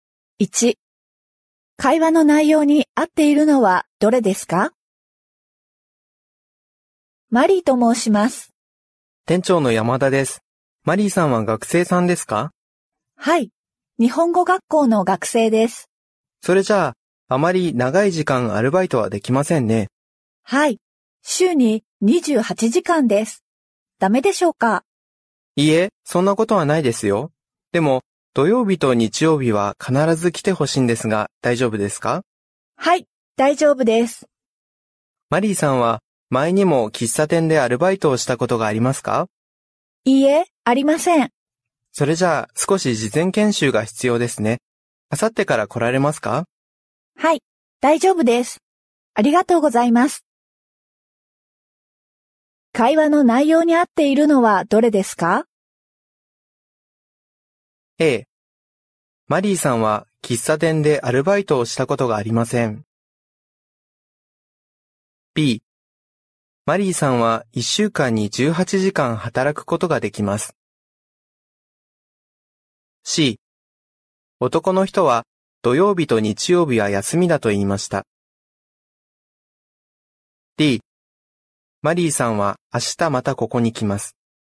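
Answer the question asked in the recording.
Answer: A: マリーさんは喫茶店でアルバイトをしたことがありません。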